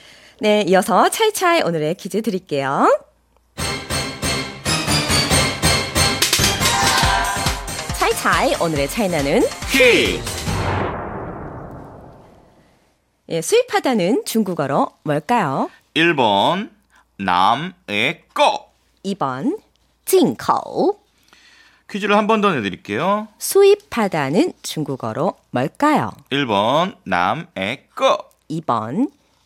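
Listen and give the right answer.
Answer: 2번: 진口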